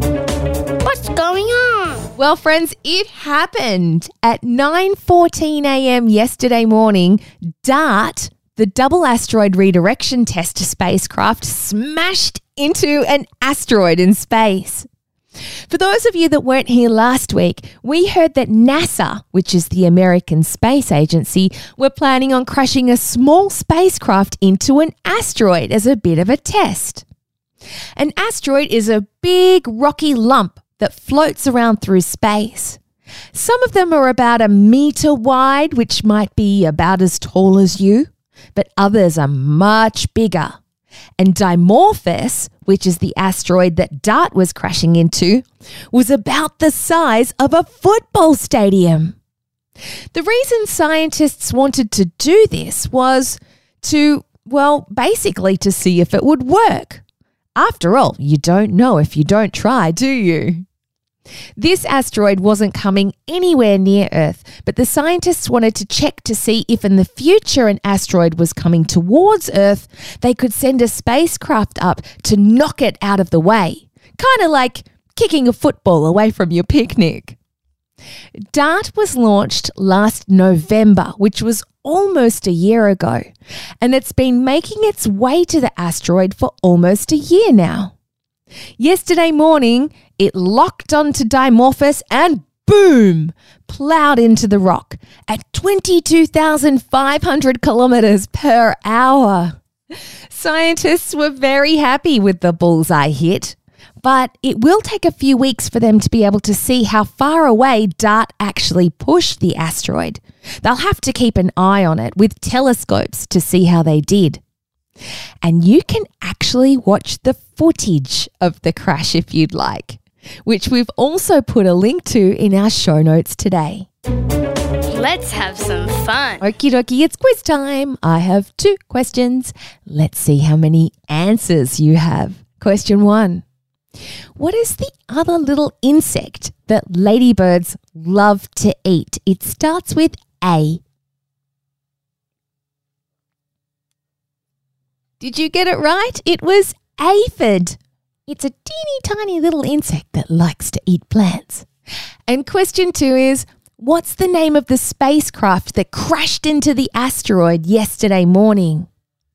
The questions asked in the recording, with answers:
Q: And question two is, what's the name of the spacecraft that crashed into the asteroid yesterday morning?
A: If you said DART, that's correct.